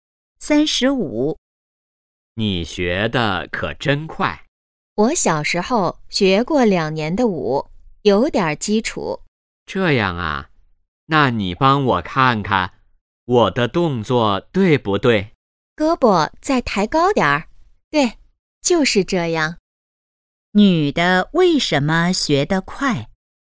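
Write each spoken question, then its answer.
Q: 女的为什么学得快?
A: 小时候学过两年舞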